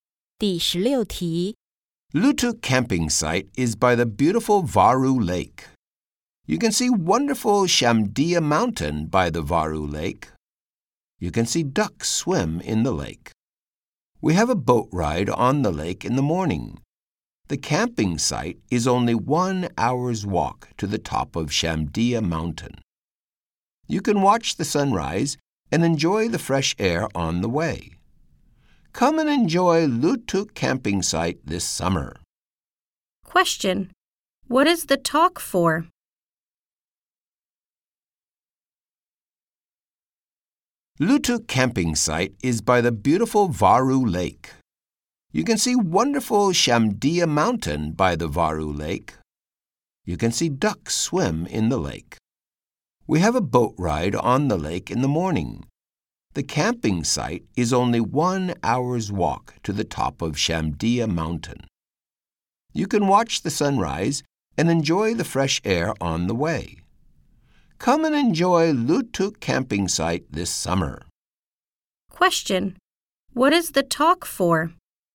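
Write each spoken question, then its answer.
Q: Question: What is the talk for?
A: To advertise Lutuk Camping Site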